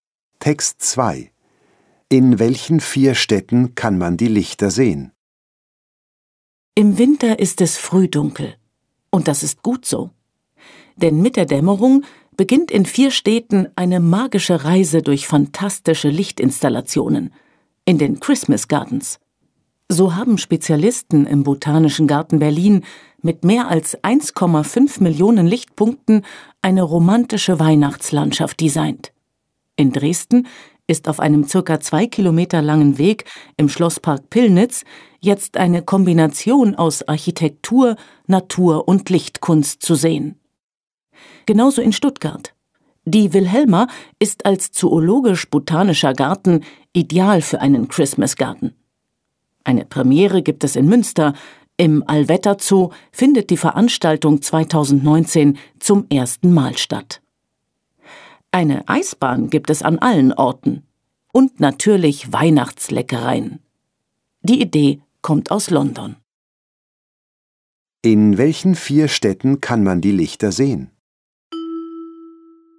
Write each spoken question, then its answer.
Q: In welchen vier Städten kann man die Lichter sehen?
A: Die Städte Berlin, Dresden, Stuttgart und Münster zeigen in ihren Gärten magische Lichter.